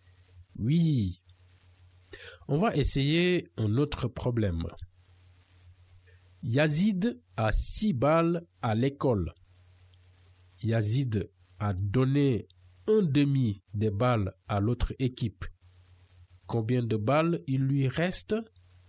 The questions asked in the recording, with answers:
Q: Combien de balles il lui reste?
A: Donc, ça veut dire qu'il lui reste 3 balles, c'est ça?